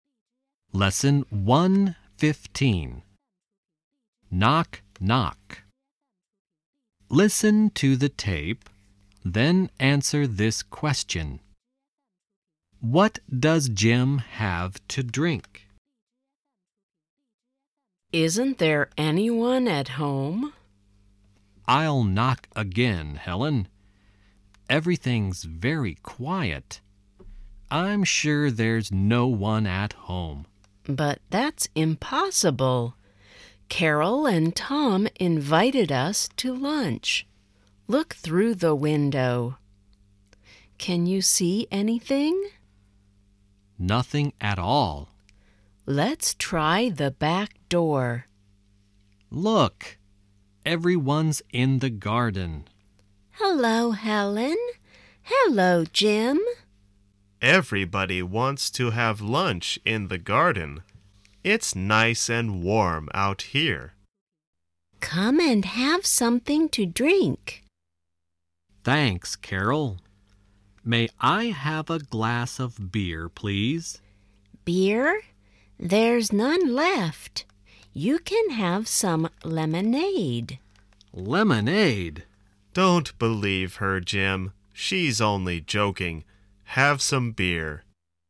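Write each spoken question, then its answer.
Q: What does Jim have to drink?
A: Beer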